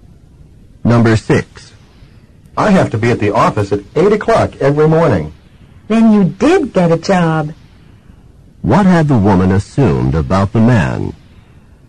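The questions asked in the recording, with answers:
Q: What had the woman assumed about the man?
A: That he didn't have a job.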